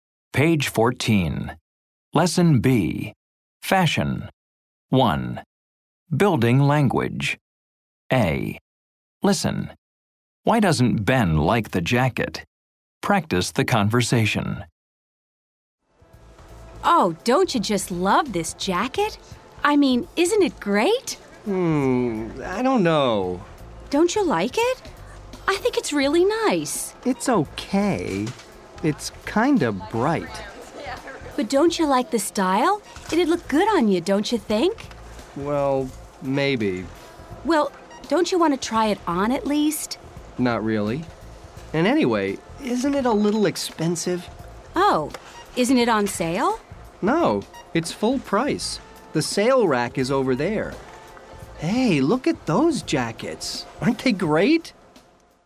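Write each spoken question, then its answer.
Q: Why doesn't Ben like the jacket?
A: It's kind of bright, and it's a little expensive (full price).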